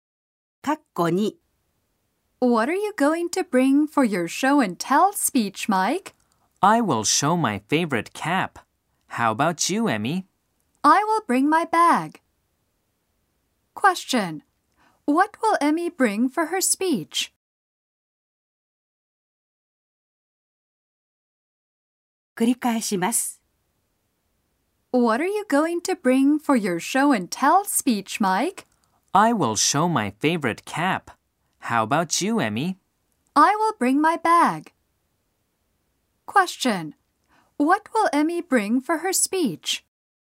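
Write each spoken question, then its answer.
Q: What will Emmy bring for her speech?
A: Her bag.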